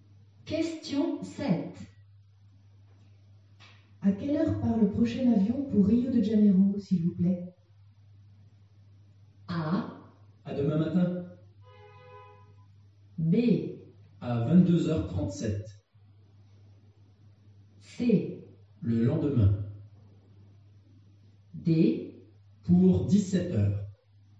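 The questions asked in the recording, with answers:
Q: À quelle heure part le prochain avion pour Rio de Janeiro, s'il vous plaît?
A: B: À 22h37.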